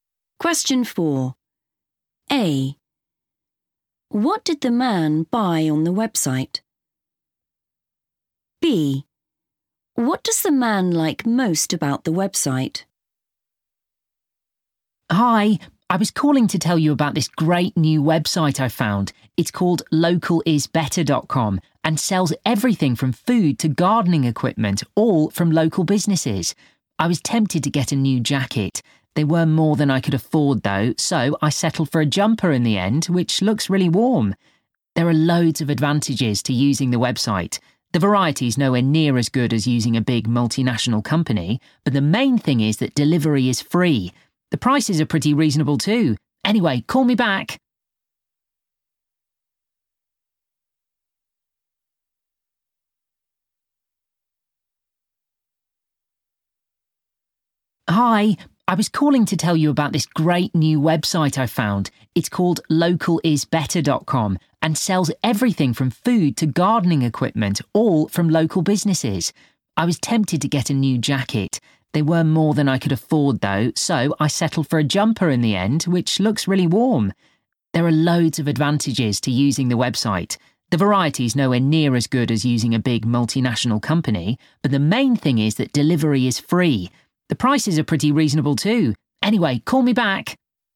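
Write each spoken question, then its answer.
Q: What did the man buy on the website?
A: a jumper

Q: What does the man like most about the website?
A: free delivery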